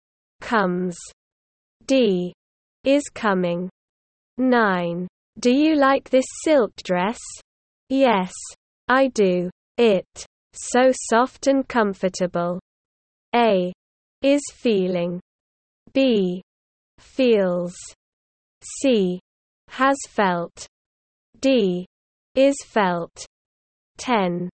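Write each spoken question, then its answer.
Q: Do you like this silk dress? Yes, I do. It. So soft and comfortable.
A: B: Feels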